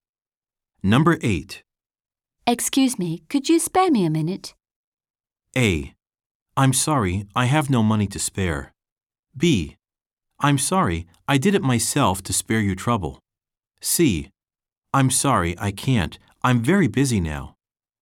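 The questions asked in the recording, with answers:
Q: Excuse me, could you spare me a minute?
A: C: I'm sorry, I can't. I'm very busy now.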